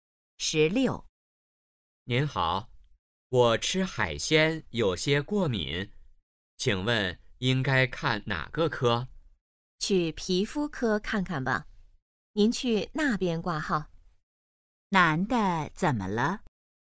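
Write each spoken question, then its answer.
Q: 男的怎么了?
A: 吃海鲜过敏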